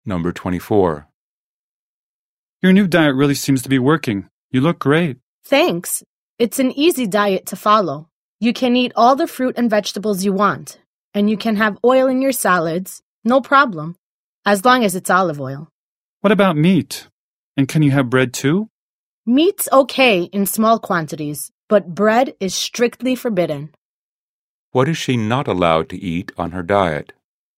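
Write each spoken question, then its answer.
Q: What is she not allowed to eat on her diet?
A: Bread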